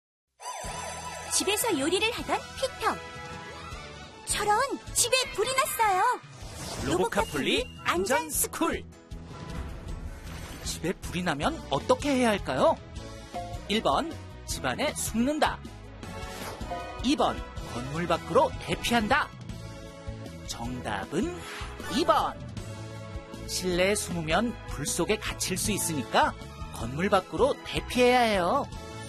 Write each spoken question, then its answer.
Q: 집에불이나면어떻게해야할까요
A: 정답은2번